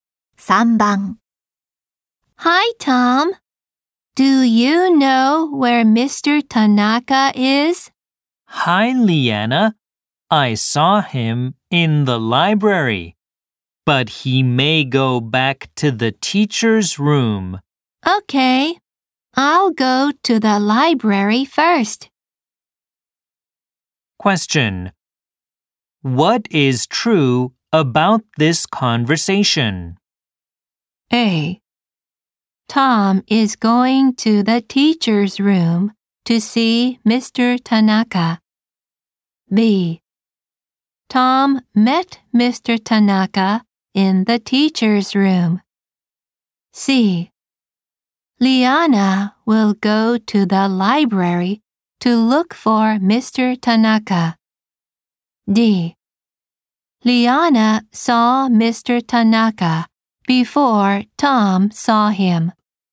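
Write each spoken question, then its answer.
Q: What is true about this conversation?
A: C: Liana will go to the library to look for Mr. Tanaka.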